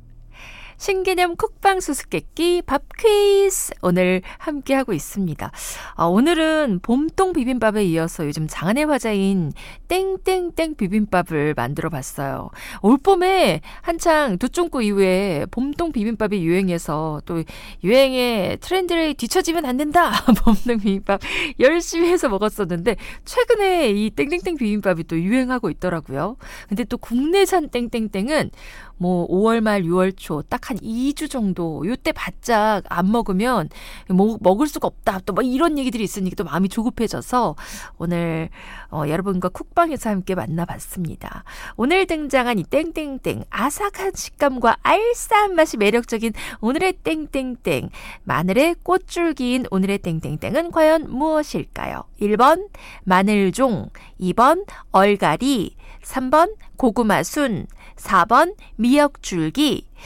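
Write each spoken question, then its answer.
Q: 오늘 등장한 이 땡땡땡 아삭한 식감과 알싸한 맛이 매력적인 오늘의 땡땡땡 마늘의 꽃줄기인 오늘의 땡땡땡은 과연 무엇일까요?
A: 1: 마늘종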